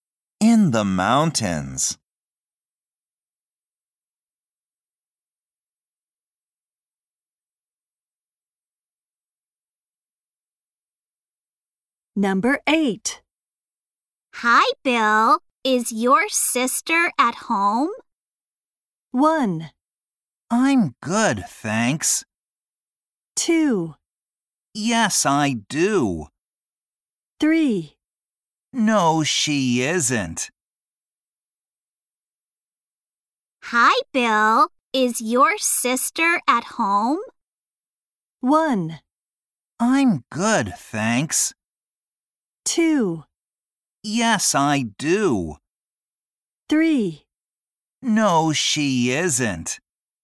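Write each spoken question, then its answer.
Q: Hi, Bill. Is your sister at home?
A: 3: No, she isn't.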